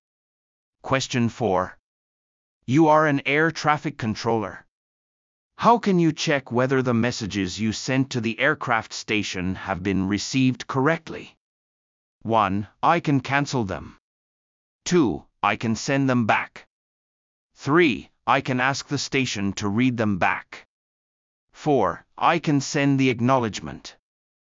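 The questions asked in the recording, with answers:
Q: How can you check whether the messages you sent to the aircraft station have been received correctly?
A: 3: I can ask the station to read them back.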